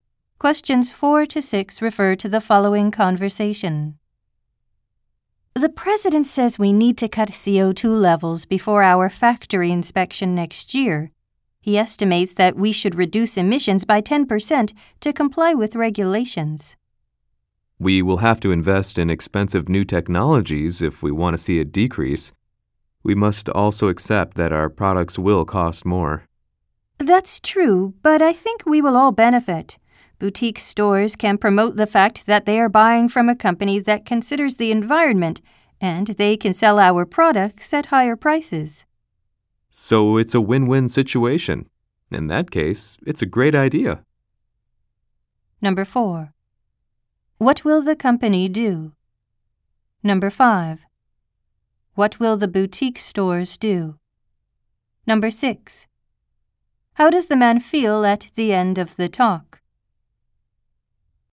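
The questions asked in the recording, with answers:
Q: What will the company do?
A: Reduce its CO2 emissions by investing in new technologies

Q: What will the boutique stores do?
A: Promote the company's environmental approach and sell the products at higher prices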